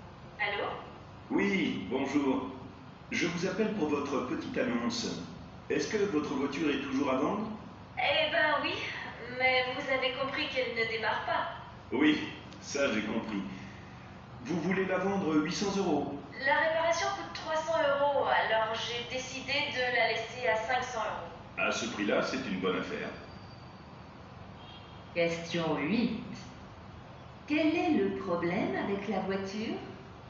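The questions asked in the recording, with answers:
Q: Quel est le problème avec la voiture?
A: Elle ne démarre pas.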